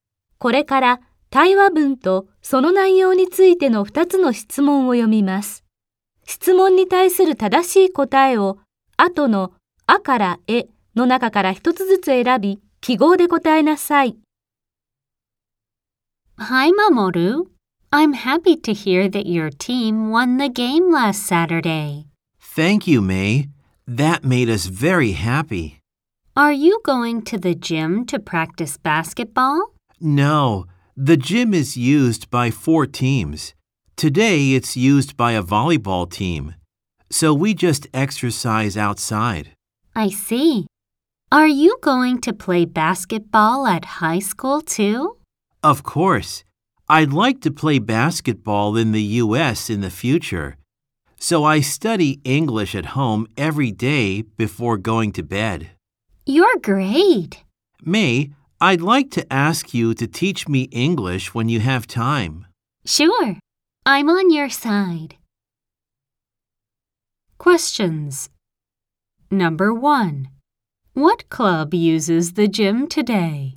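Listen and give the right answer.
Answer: A volleyball team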